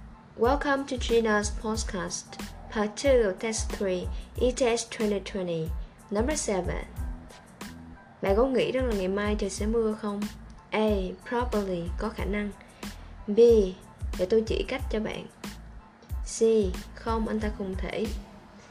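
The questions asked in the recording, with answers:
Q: Bạn có nghĩ rằng là ngày mai trời sẽ mưa không?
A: A: Probably, có khả năng.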